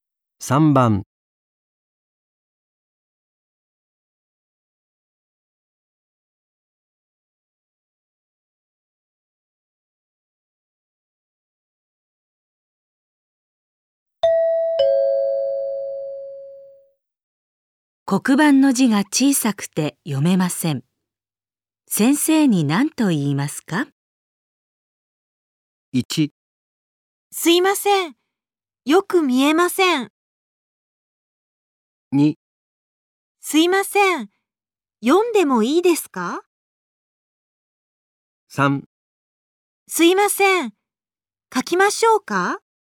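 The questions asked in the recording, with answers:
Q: 黒板の字が小さくて読めません。先生に何と言いますか?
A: 1: すいません。よく見えません。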